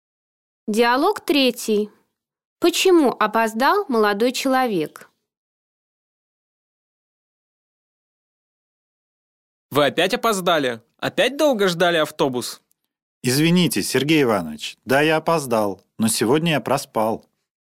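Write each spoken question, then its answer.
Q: Почему опоздал молодой человек?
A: Он проспал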